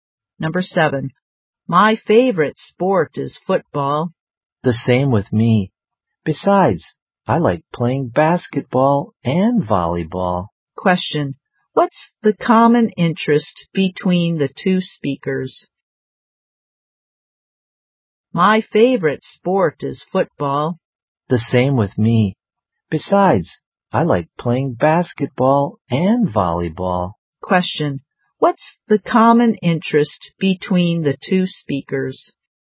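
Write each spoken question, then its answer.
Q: what's the common interest between the two speakers?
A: Football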